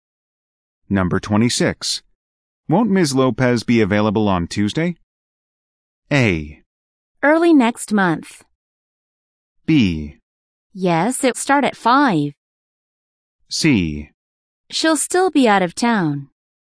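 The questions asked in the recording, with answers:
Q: Won't Ms. Lopez be available on Tuesday?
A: C: She'll still be out of town.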